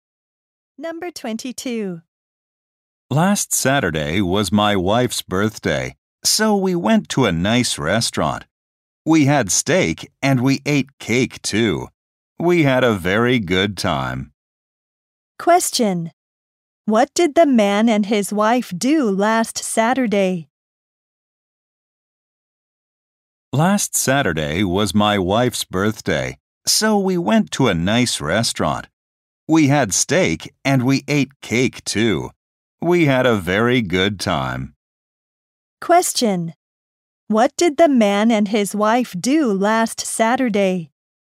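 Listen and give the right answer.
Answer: They went to a nice restaurant.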